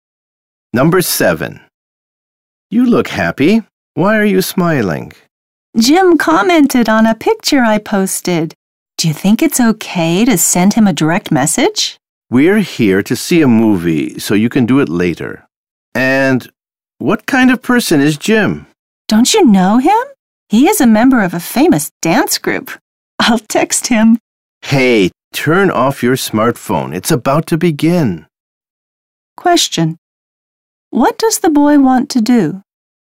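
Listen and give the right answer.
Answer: Send Jim a direct message.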